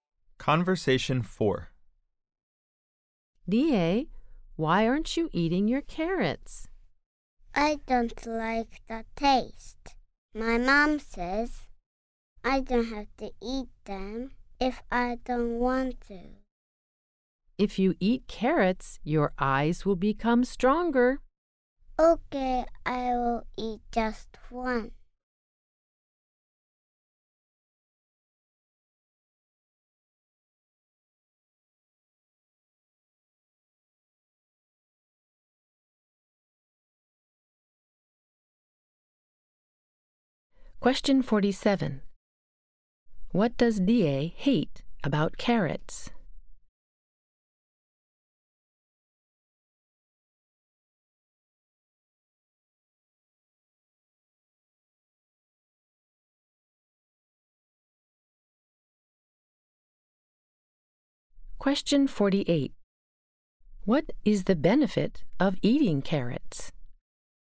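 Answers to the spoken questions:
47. The taste.
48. Your eyes become stronger.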